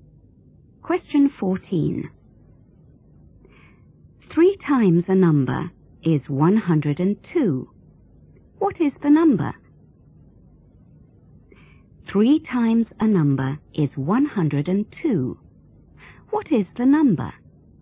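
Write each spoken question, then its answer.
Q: 3 times a number is 102. What is the number?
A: 34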